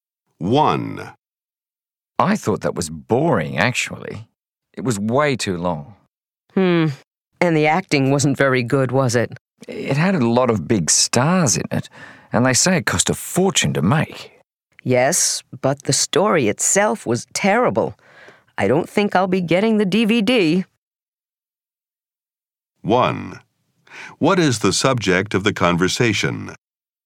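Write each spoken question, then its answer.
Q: What is the subject of the conversation?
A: A movie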